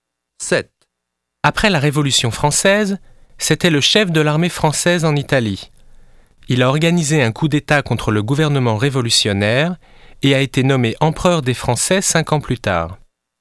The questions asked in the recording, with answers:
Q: Après la Révolution française, c'était le chef de l'armée française en Italie. Il a organisé un coup d'État contre le gouvernement révolutionnaire et a été nommé empereur des Français 5 ans plus tard.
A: C'est Napoléon Bonaparte. Il est du XVIIIe et du XIXe siècle.